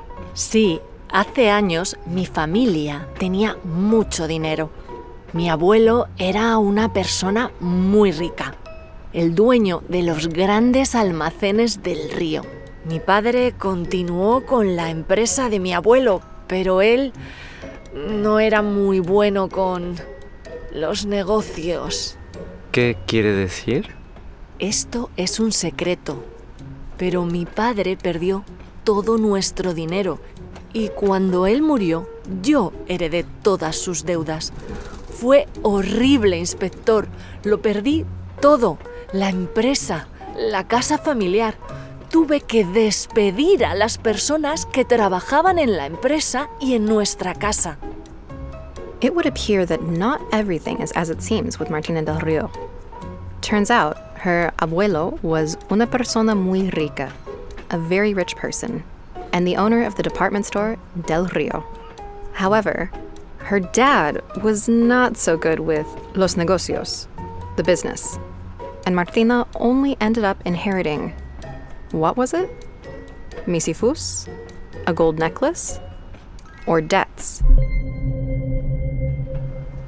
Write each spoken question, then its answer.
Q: Martina only ended up inheriting, what was it?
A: Correcto. She only inherited deudas, debts.